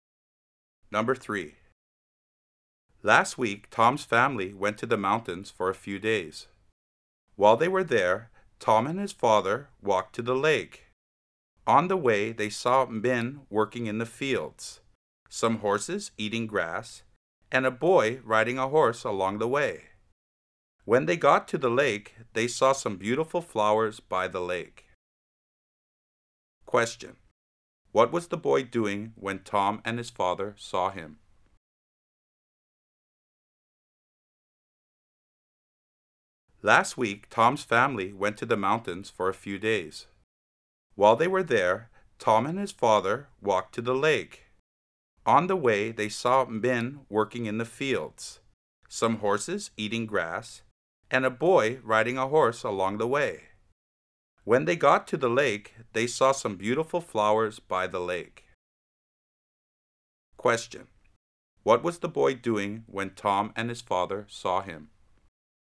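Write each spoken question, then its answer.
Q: What was the boy doing when Tom and his father saw him?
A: Riding a horse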